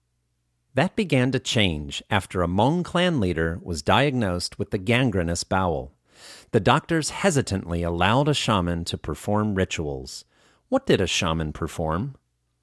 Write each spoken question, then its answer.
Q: What did a shaman perform?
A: A shaman performed rituals.